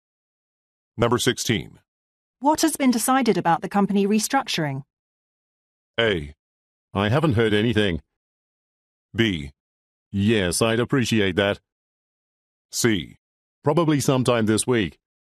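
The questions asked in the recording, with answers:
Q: What has been decided about the company restructuring?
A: A: I haven't heard anything.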